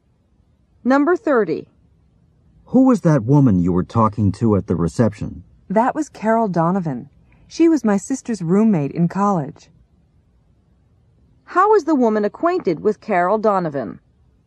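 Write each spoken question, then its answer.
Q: How is the woman acquainted with Carol Donovan?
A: Carol was her sister's college roommate.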